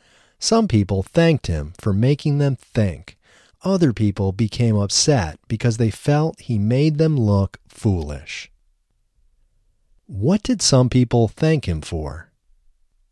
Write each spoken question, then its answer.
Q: What did some people thank him for?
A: Some people thanked him for making them think.